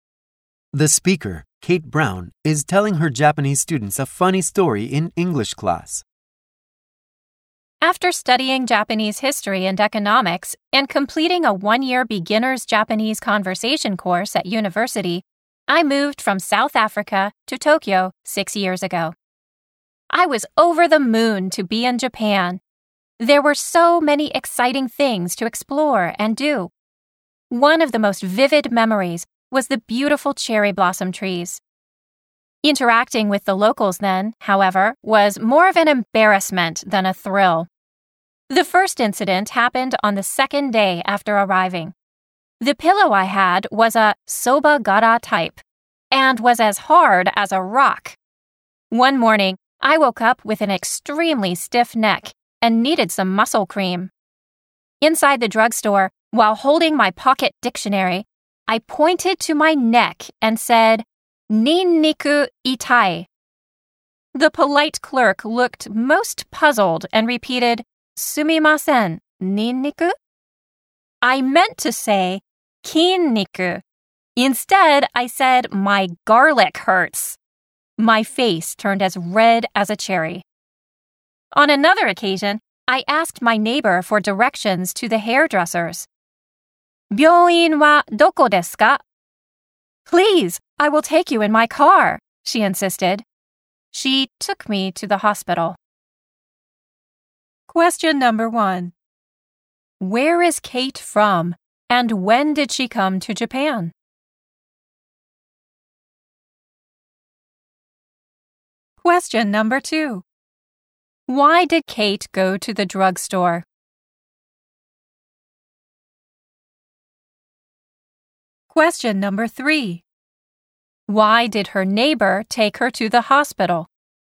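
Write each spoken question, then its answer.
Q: Where is Kate from, and when did she come to Japan?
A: She is from South Africa and came to Japan 6 years ago.

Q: Why did Kate go to the drugstore?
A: To buy muscle cream for her stiff neck.

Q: Why did her neighbor take her to the hospital?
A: Because Kate said byouin (hospital) instead of biyouin (hairdresser's) when asking for directions.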